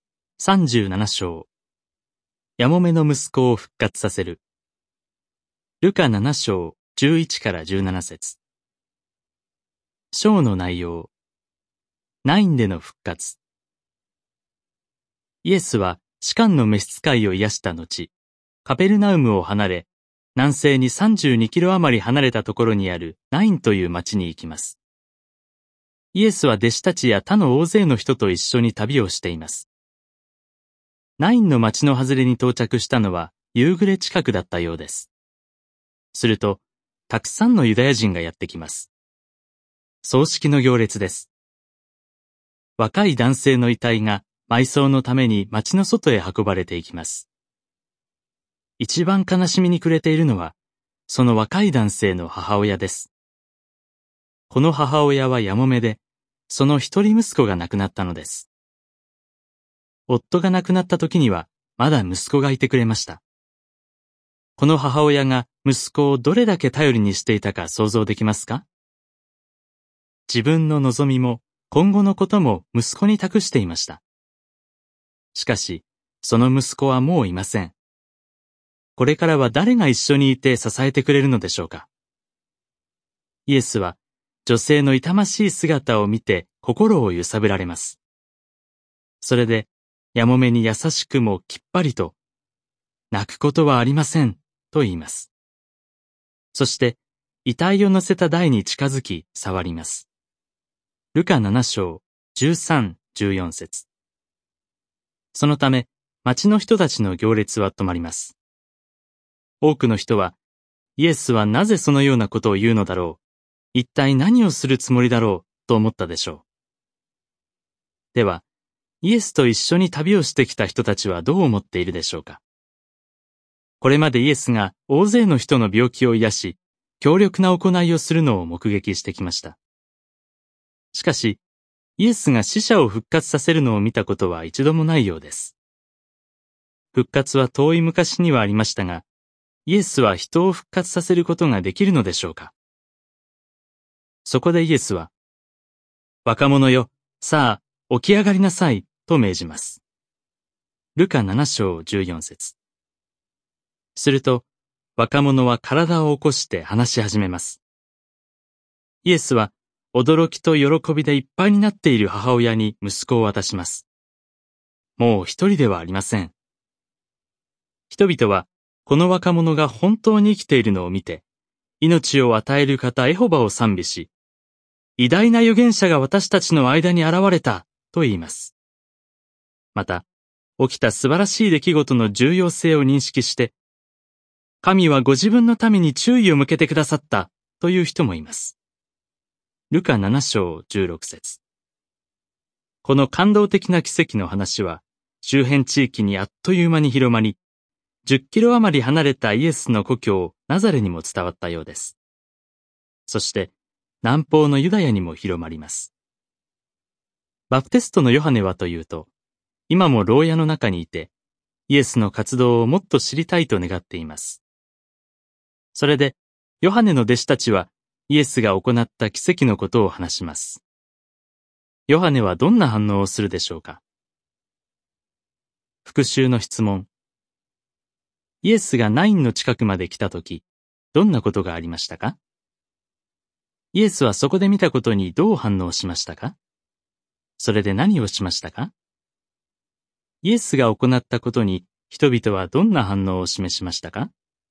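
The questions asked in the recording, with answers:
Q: イエスがナインの近くまで来たとき、どんなことがありましたか。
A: ヤモメの一人息子の葬式の行列が町の外へ出てくるところだった

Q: イエスはそこで見たことにどう反応しましたか。それで何をしましたか?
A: 心を揺さぶられ、母親に泣かないように言い、台に触って若者を復活させ、母親に返した

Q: イエスが行ったことに人々はどんな反応を示しましたか?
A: エホバを賛美し、偉大な預言者が現れた、神が注意を向けてくださったと言い、話が周辺地域に広まった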